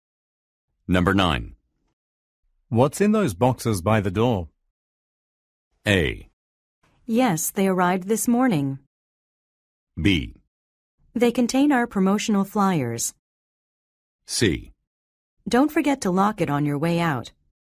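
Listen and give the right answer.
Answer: B: They contain our promotional flyers.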